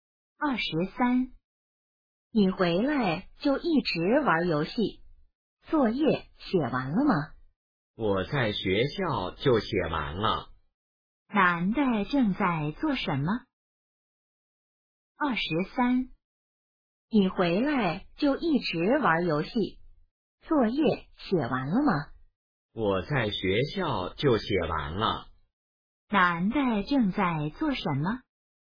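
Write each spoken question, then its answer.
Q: 男的正在做什么?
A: 玩游戏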